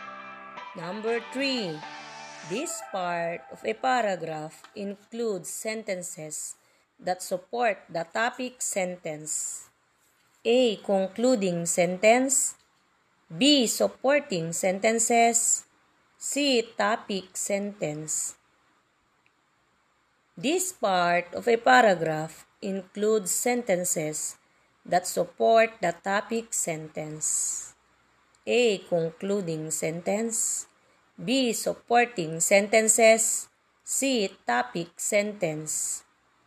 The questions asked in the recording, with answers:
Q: This part of a paragraph includes sentences that support the topic sentence.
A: Yes, letter B.